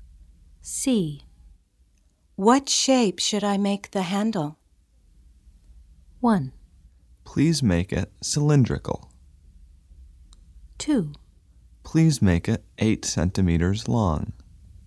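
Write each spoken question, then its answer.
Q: What shape should I make the handle?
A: 1: Please make it cylindrical.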